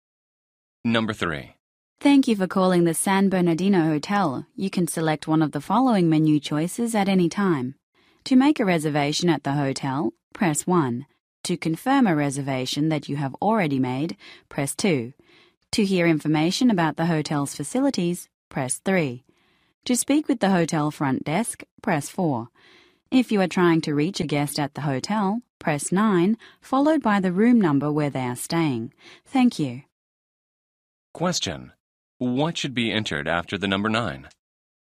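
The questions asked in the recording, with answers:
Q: What should be entered after the number 9?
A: The guest's room number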